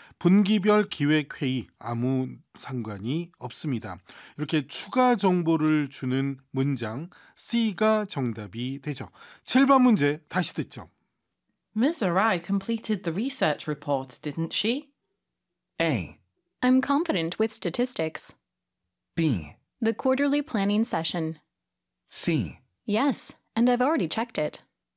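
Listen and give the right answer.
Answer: C: Yes, and I've already checked it.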